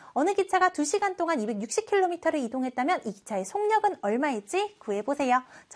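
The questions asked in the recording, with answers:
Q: 어느 기차가 2시간 동안 260km를 이동했다면 이 기차의 속력은 얼마일지 구해보세요.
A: 130km/h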